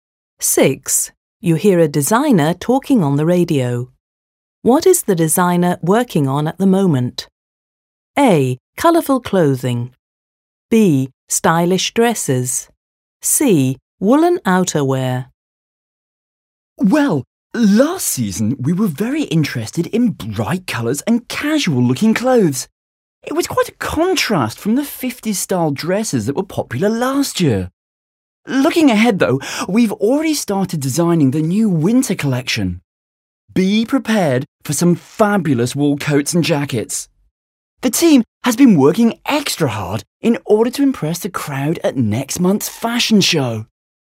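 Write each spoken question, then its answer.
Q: What is the designer working on at the moment?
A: C: Woolen outerwear.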